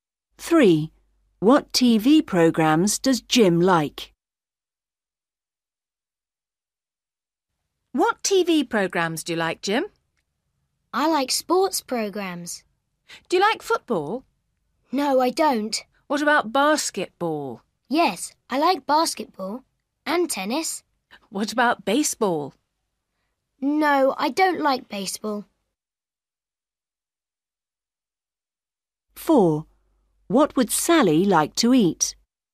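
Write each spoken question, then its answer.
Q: What TV programmes does Jim like?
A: Basketball and tennis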